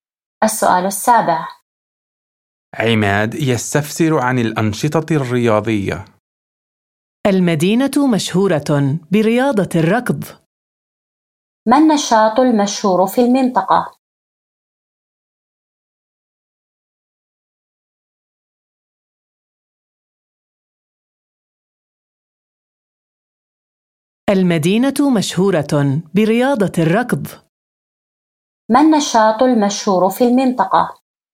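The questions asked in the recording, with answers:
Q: ما النشاط المشهور في المنطقة؟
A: رياضة الركض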